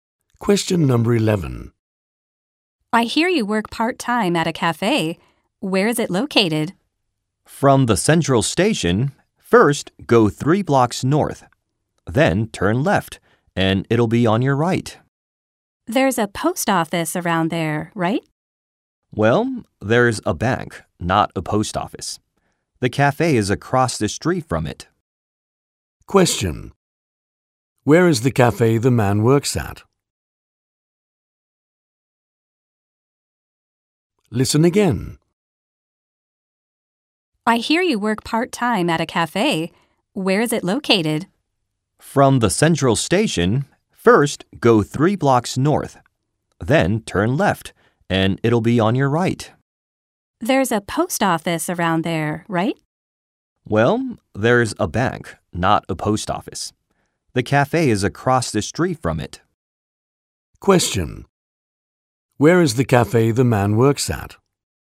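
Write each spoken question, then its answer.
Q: Where is the cafe the man works at?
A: Three blocks north of the central station, then left, on the right, across the street from a bank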